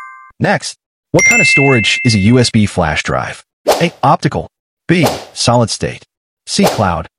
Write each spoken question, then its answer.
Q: what kind of storage is a USB flash drive?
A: The correct answer is B. Solid state.